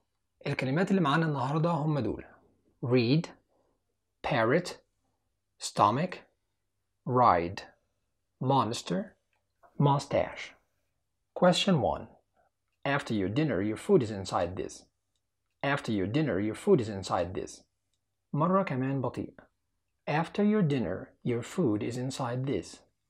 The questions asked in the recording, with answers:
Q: After your dinner, your food is inside this.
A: الإجابة هي stomach.